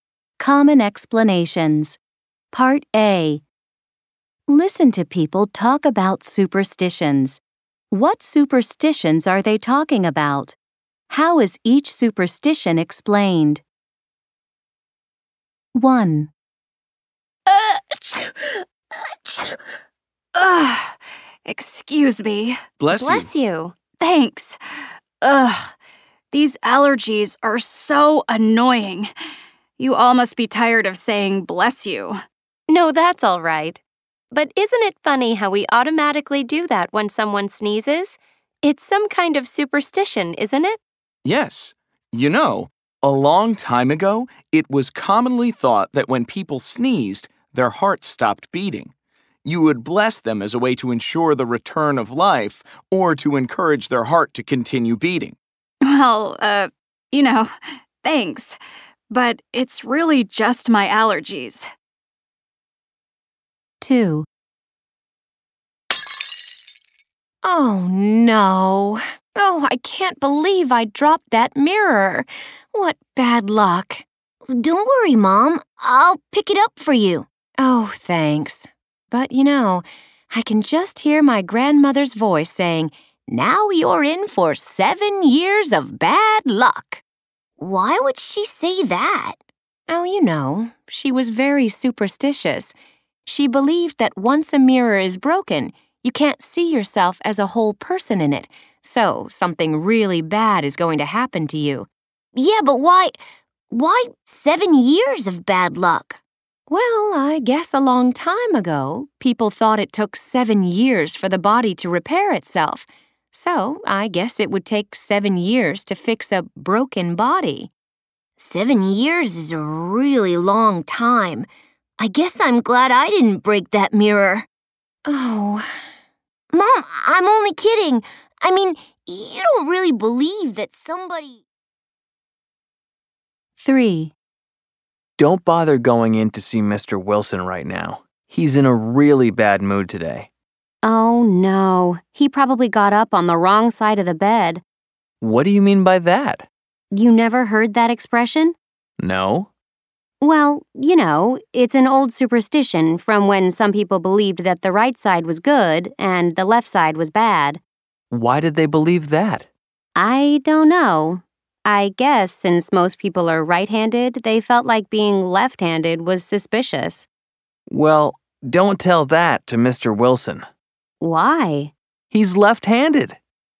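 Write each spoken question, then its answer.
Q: What superstitions are they talking about?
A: Saying 'bless you' when someone sneezes; breaking a mirror brings 7 years of bad luck; getting up on the wrong side of the bed

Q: How is each superstition explained?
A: People thought the heart stopped when sneezing; the body was thought to take 7 years to repair itself; the right side was considered good and the left side bad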